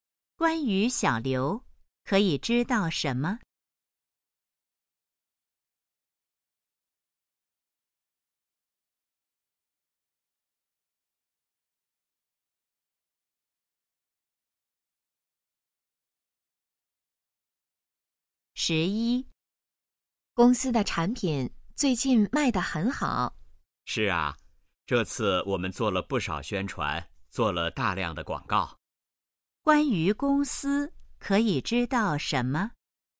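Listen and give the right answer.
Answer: 做了大量广告宣传,产品卖得很好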